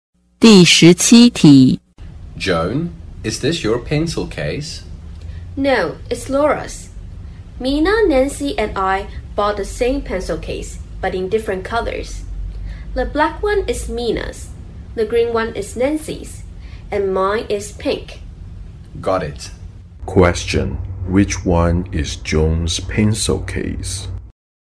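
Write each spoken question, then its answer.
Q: Which one is Joan's pencil case?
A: The pink one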